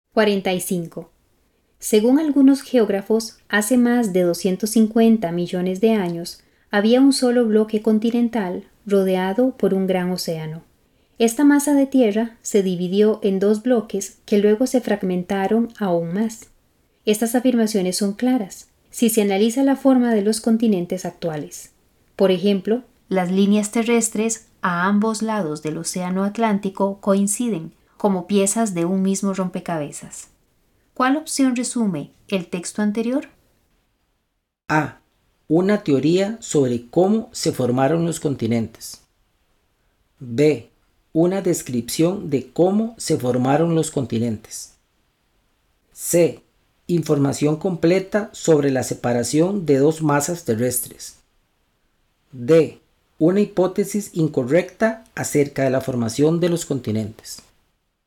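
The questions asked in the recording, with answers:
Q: ¿Cuál opción resume el texto anterior?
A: A: Una teoría sobre cómo se formaron los continentes.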